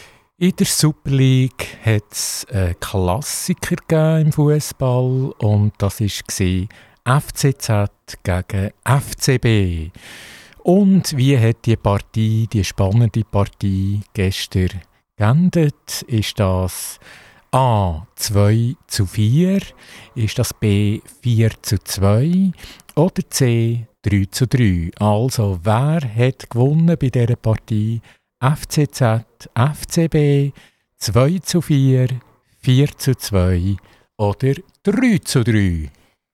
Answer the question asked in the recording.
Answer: Also A ist richtig 2 zu 4 oder anders gesagt, der FCB, FC Basel hat Zürich, der FCZ 4 zu 2 geschlagen.